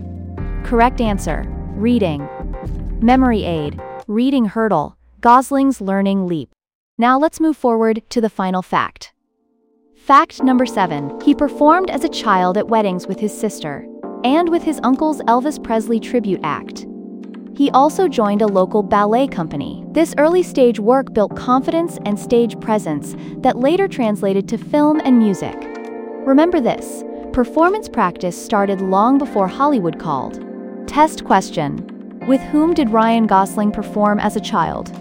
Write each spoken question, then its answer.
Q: With whom did Ryan Gosling perform as a child?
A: Correct answer. His sister and his uncle's Elvis tribute act.